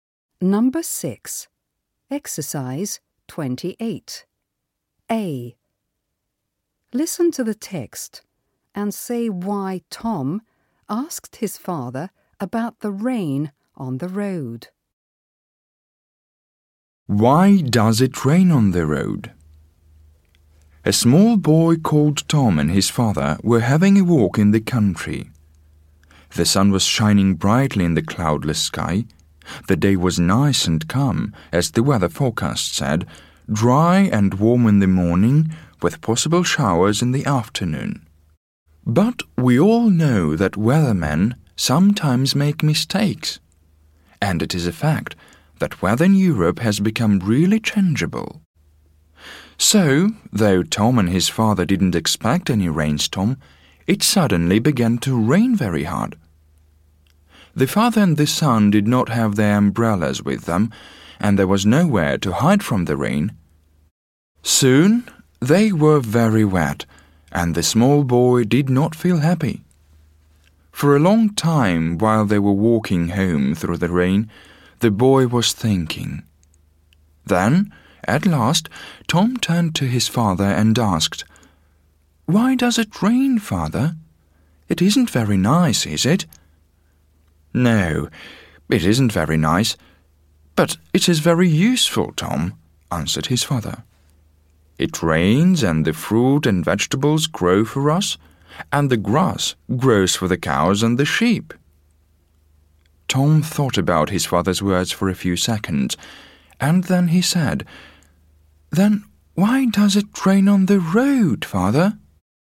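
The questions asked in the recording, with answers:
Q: Listen to the text and say why Tom asked his father about the rain on the road.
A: His father said rain is useful because it makes fruit, vegetables and grass grow, but nothing grows on the road, so rain there seemed useless.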